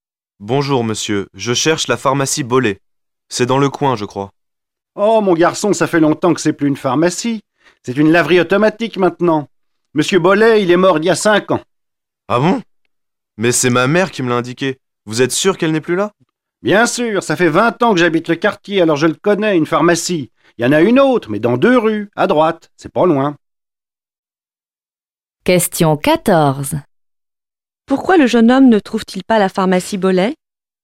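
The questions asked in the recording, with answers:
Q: Pourquoi le jeune homme ne trouve-t-il pas la pharmacie Bollet?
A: Parce que ce n'est plus une pharmacie : c'est devenu une laverie automatique (M. Bollet est mort il y a 5 ans).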